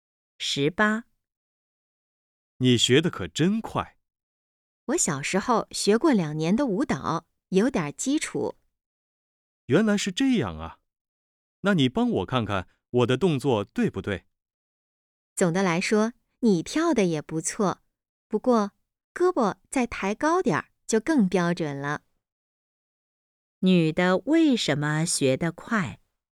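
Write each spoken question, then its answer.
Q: 女的为什么学得快?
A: 小时候学过2年舞蹈,有基础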